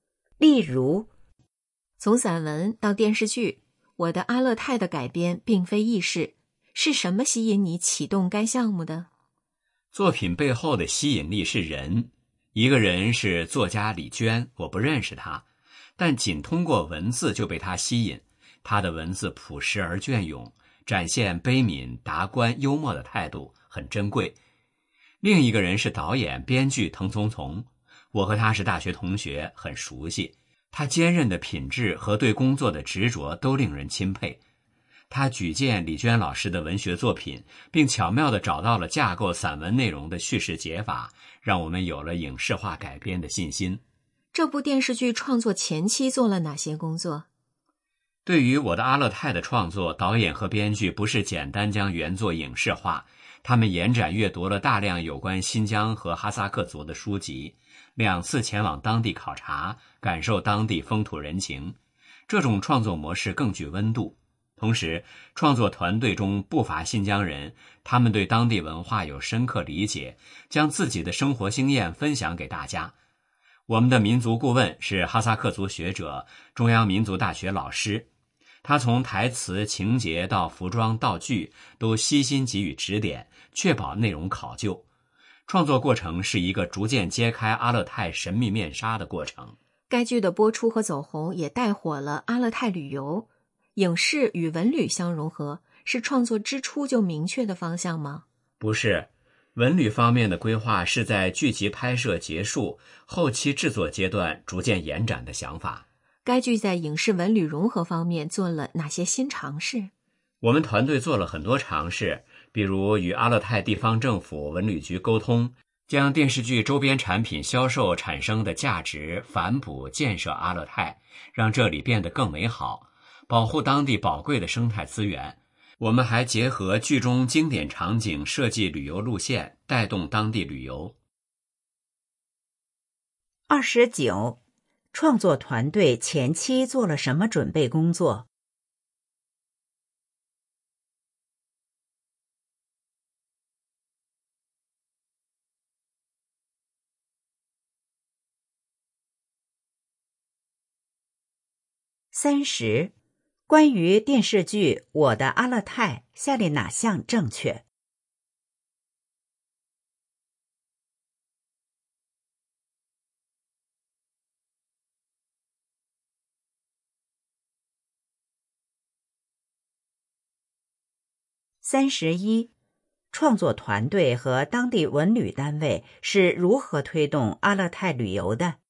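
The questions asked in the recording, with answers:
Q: 创作团队前期做了什么准备工作?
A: 阅读大量有关新疆和哈萨克族的书籍,两次前往当地考察

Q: 创作团队和当地文旅单位是如何推动阿勒泰旅游的?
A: 用周边产品销售收益反哺阿勒泰建设,并结合剧中经典场景设计旅游路线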